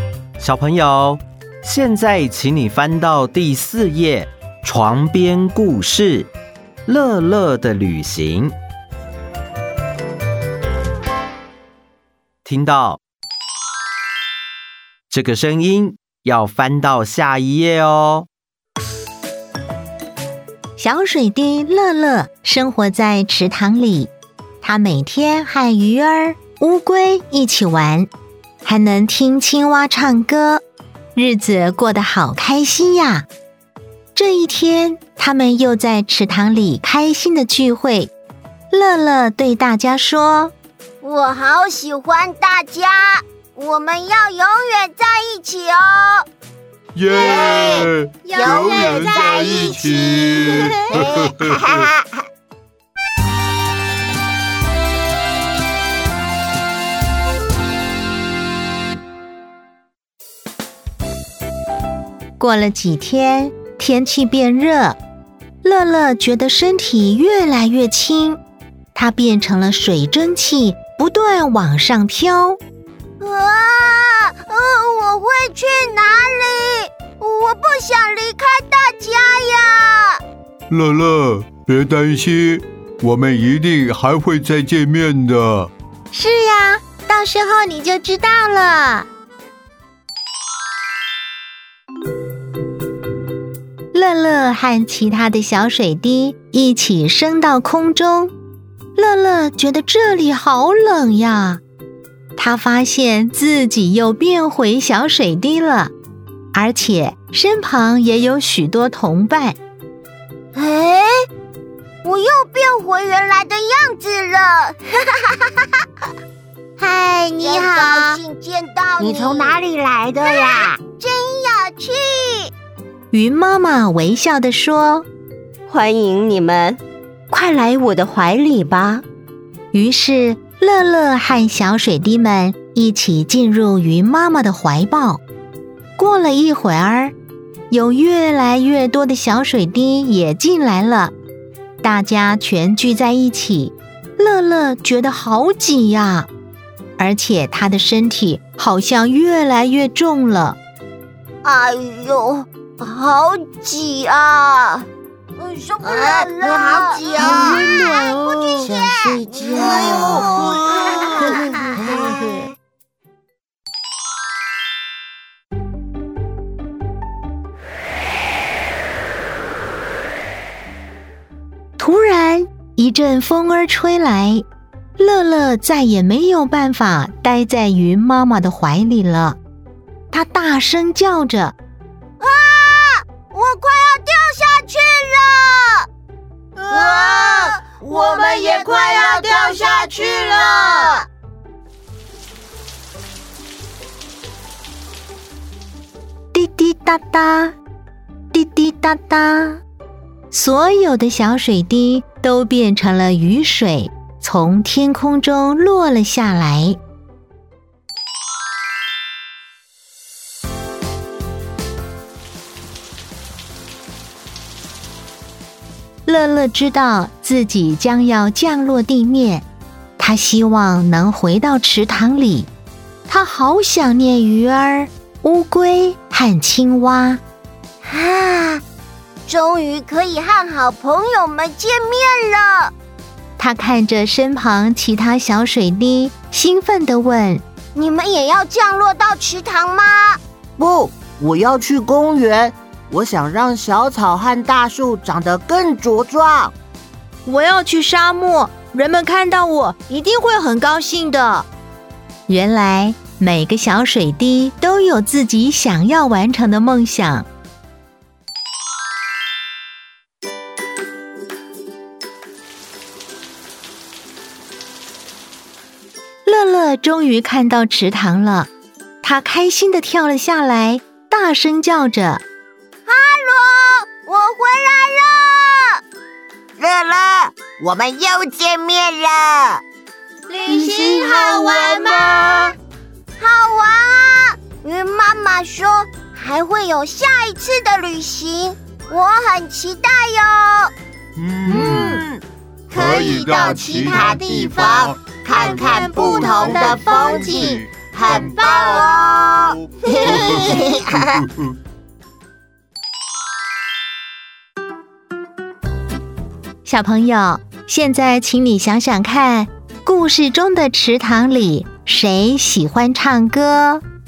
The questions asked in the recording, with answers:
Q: 故事中的池塘里谁喜欢唱歌?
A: 青蛙。答对了。